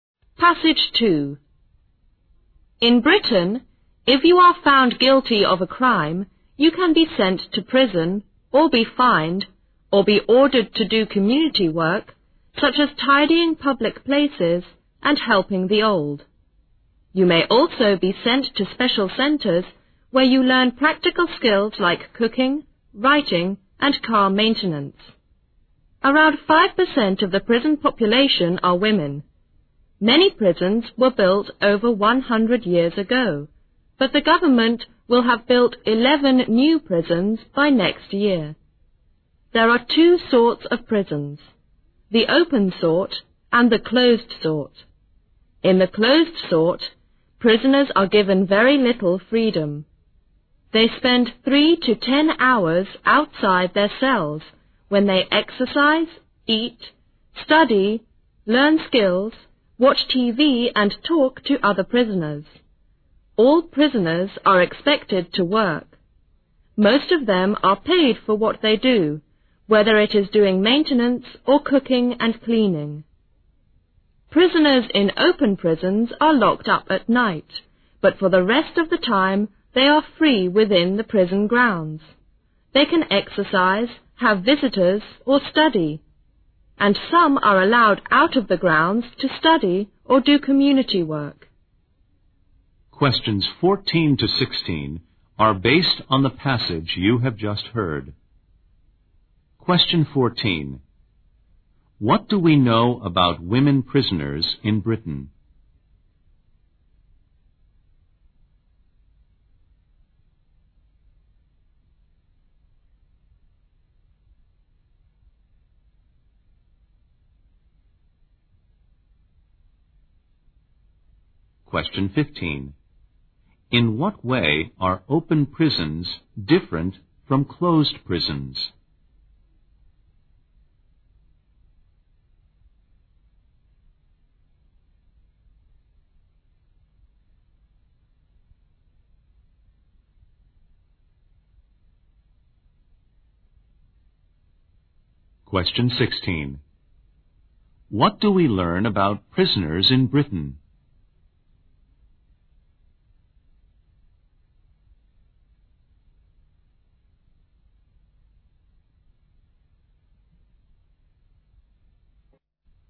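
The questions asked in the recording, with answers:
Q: What do we know about women prisoners in Britain?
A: They are about 5% of the prison population.

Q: In what way are open prisons different from closed prisons?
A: Prisoners in open prisons have more freedom; they are only locked up at night and are free within the prison grounds the rest of the time.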